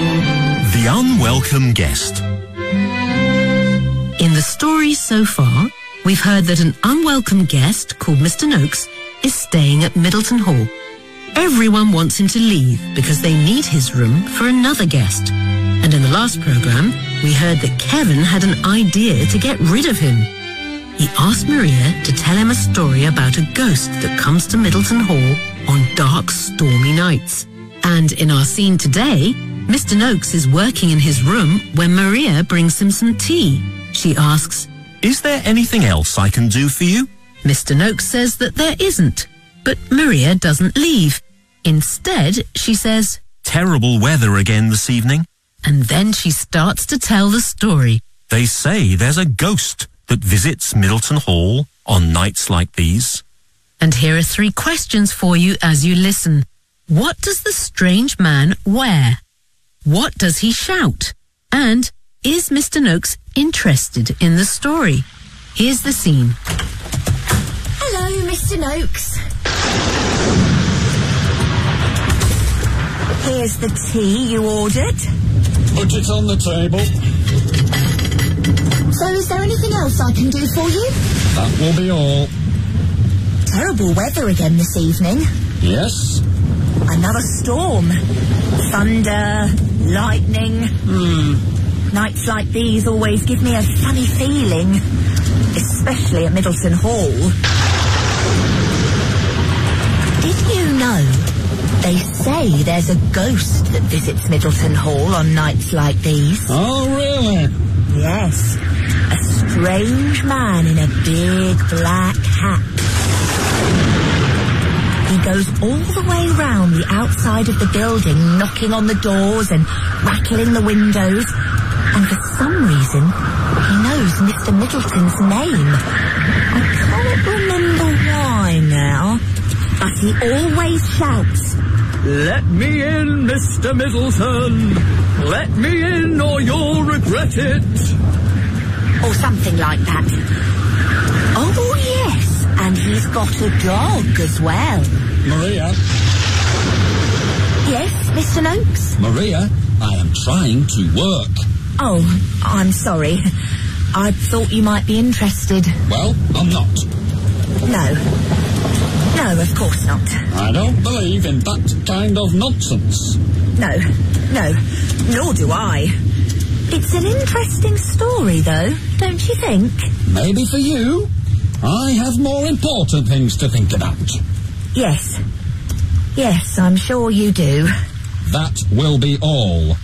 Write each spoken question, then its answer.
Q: What does the strange man wear?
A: A big black hat.

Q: What does he shout?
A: "Let me in, Mr. Middleton!

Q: And is Mr. Noakes interested in the story?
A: No, he tells Maria,